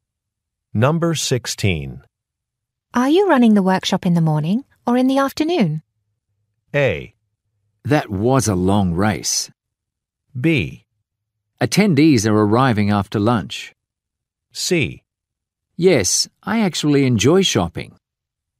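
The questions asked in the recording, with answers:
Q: Are you running the workshop in the morning or in the afternoon?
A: B: Attendees are arriving after lunch.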